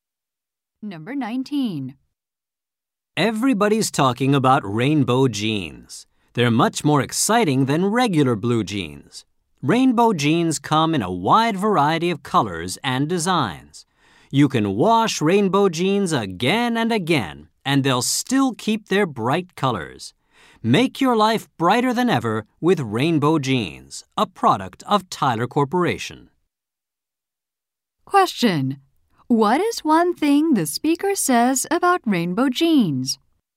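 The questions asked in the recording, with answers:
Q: What is one thing the speaker says about rainbow jeans?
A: They keep their bright colors after washing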